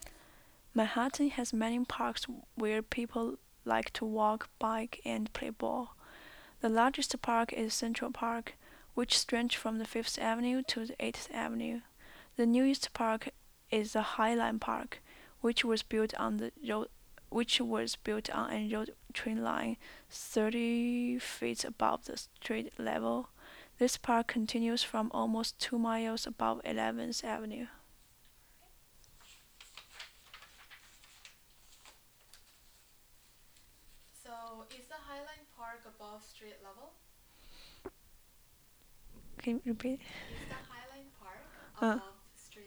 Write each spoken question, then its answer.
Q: Is the Highline Park above street level?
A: Yes, it is above the street level.